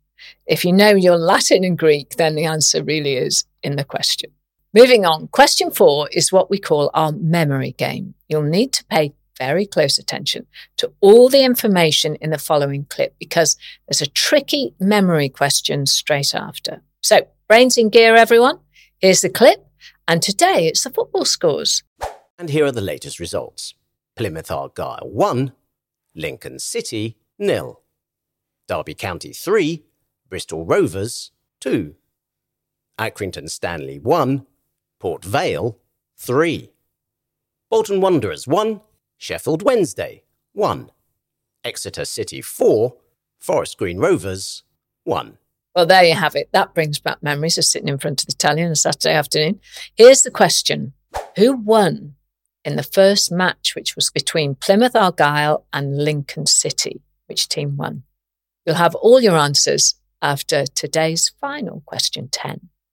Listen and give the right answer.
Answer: The answer was Plymouth Argyle, and in the clip, Plymouth Argyle won 1-0 against Lincoln City.